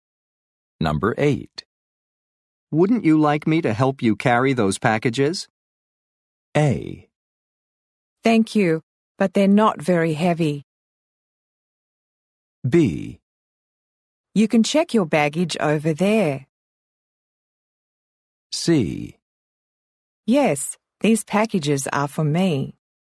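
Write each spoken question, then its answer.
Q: Wouldn't you like me to help you carry those packages?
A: A: Thank you, but they're not very heavy.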